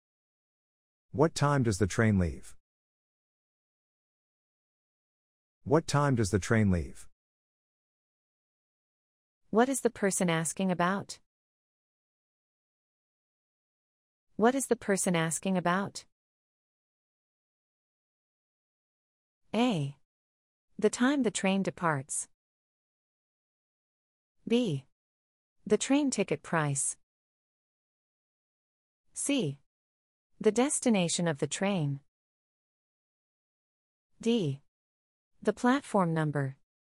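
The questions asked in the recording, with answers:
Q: What is the person asking about?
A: A: The time the train departs.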